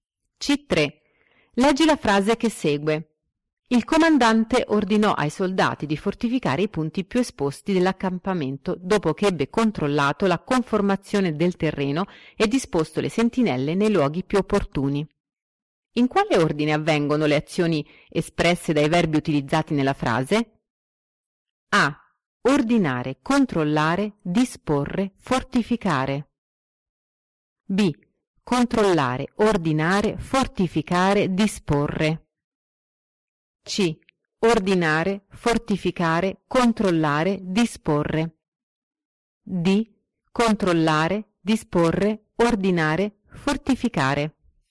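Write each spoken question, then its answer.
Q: In quale ordine avvengono le azioni espresse dai verbi utilizzati nella frase?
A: D: Controllare, disporre, ordinare, fortificare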